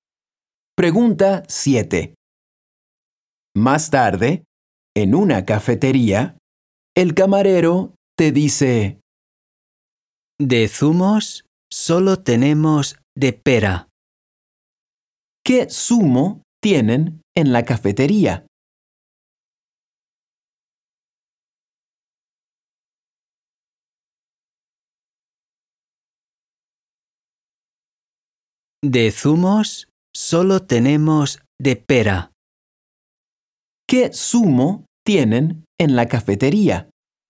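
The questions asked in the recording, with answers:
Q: ¿Qué zumo tienen en la cafetería?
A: de pera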